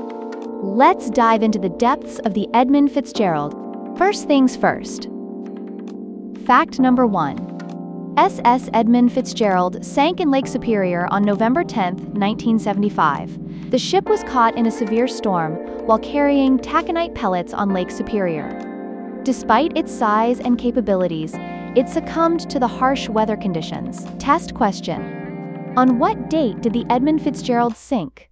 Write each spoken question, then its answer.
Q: On what date did the Edmund Fitzgerald sink?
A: November 10, 1975.